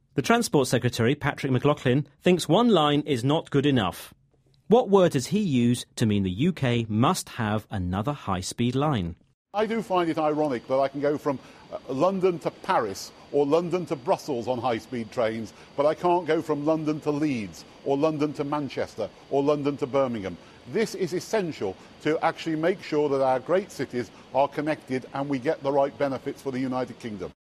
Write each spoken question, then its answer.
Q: What word does he use to mean the UK must have another high-speed line?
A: He used the word essential to mean a new line to connect British cities has to be built.